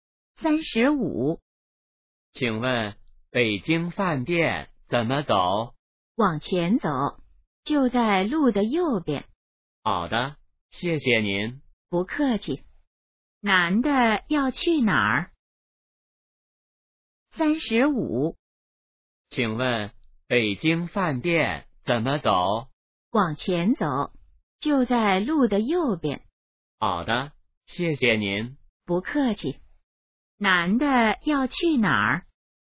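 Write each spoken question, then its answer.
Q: 男的要去哪儿?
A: 北京饭店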